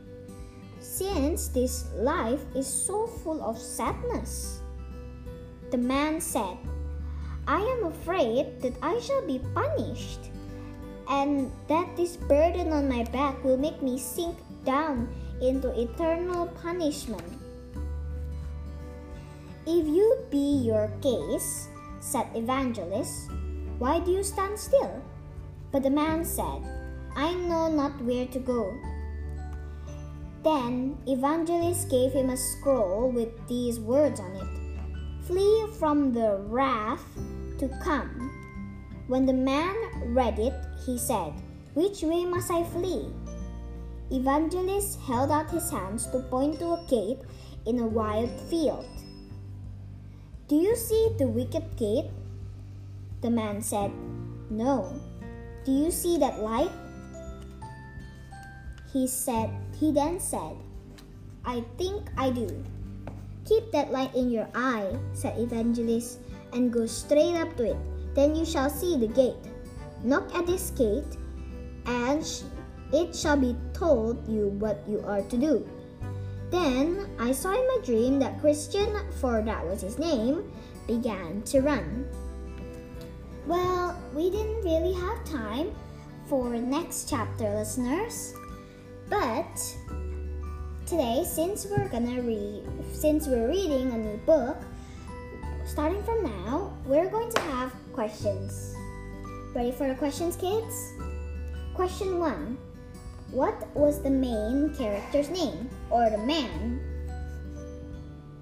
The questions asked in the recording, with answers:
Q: What was the main character's name, or the man?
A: If you said his name was Christian, then you were right.